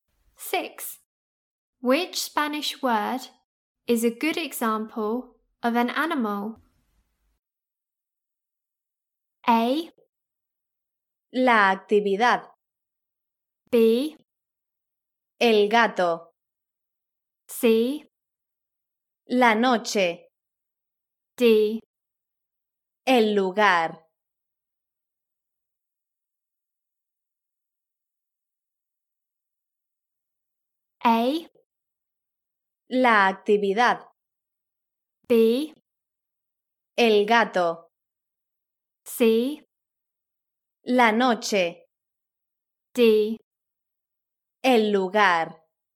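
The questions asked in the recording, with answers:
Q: Which Spanish word is a good example of an animal?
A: B: El gato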